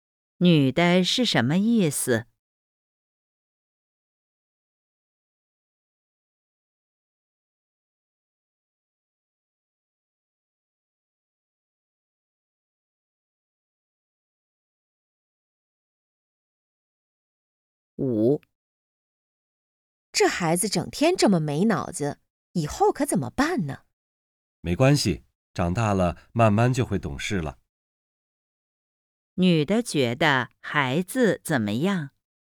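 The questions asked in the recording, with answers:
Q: 女的觉得孩子怎么样?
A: 长大了慢慢就会懂事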